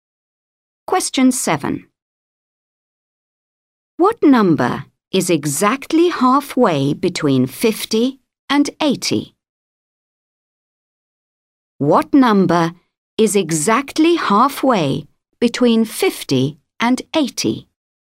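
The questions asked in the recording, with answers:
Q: What number is exactly halfway between 50 and 80?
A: 65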